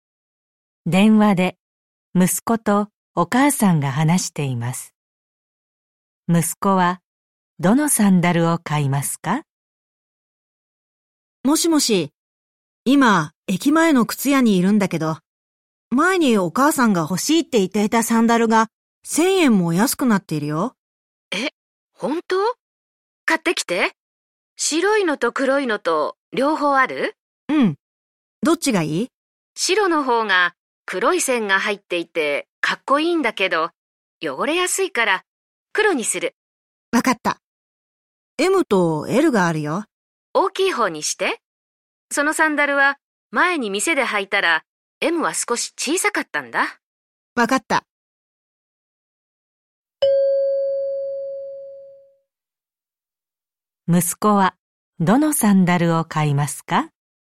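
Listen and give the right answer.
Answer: 黒いLサイズのサンダル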